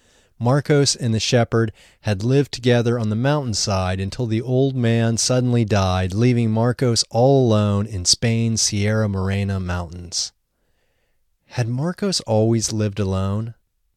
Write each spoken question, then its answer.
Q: Had Marcos always lived alone?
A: No, Marcos hadn't always lived alone.